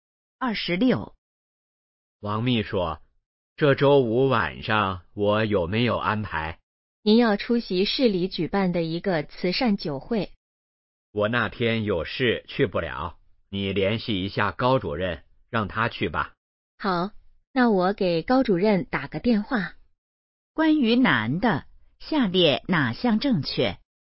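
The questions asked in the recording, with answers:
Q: 关于男的,下列哪项正确?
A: 周五去不了慈善酒会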